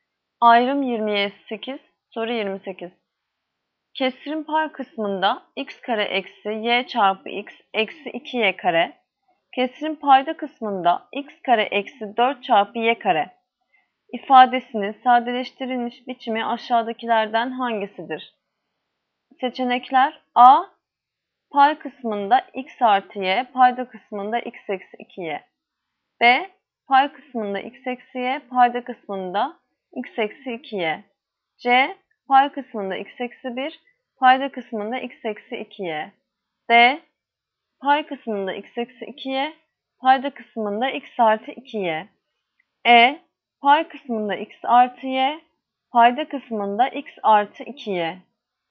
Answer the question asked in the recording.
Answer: Yanıt Edirne x artı y bölü x artı 2y.